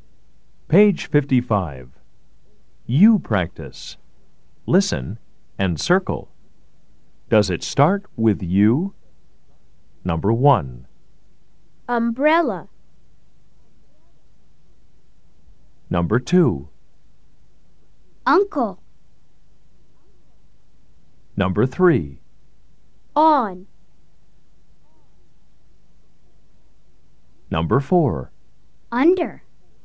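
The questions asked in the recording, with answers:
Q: Does it start with you?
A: Yes

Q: Does it start with you?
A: Yes

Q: Does it start with you?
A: No

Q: Does it start with you?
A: Yes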